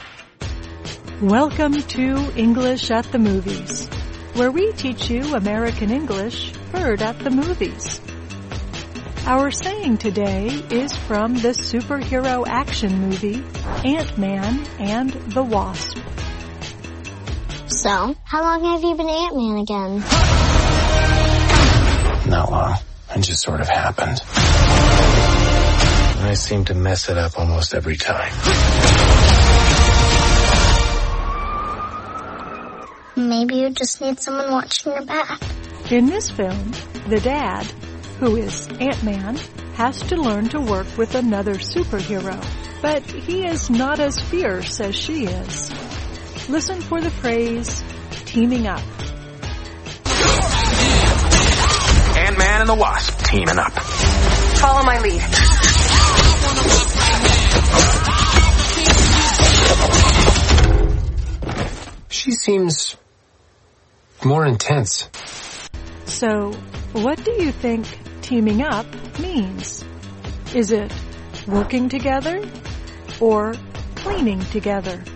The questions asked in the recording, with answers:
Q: So, what do you think teaming up means?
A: Teaming up means working together.